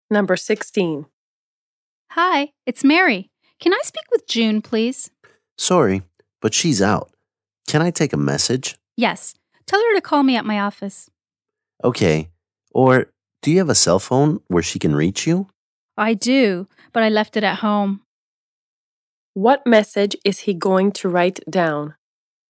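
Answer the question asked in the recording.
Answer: Call Mary at her office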